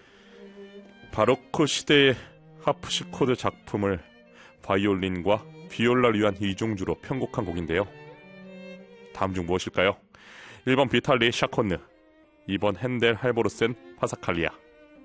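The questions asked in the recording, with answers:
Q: 다음 중 무엇일까요? 1번 비탈리 샤콘느, 2번 핸델 할보르센 파사칼리아.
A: 2: 핸델 할보르센 파사칼리아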